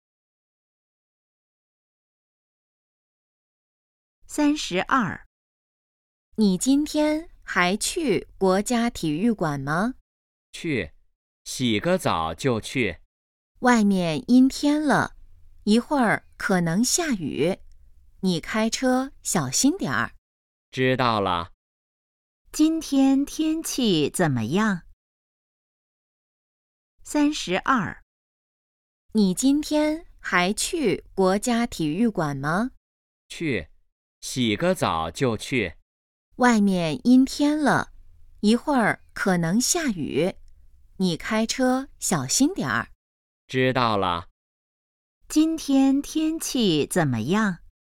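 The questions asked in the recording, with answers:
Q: 今天天气怎么样?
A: 阴天,可能下雨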